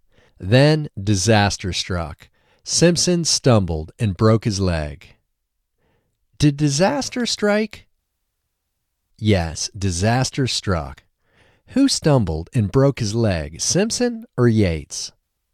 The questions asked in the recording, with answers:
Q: Who stumbled and broke his leg, Simpson or Yates?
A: Simpson stumbled and broke his leg.